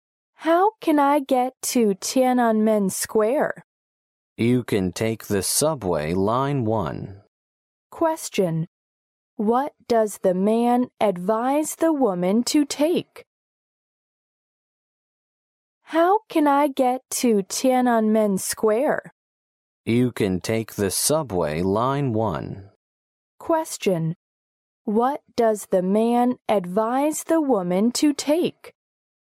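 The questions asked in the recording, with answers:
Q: What does the man advise the woman to take?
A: Subway line 1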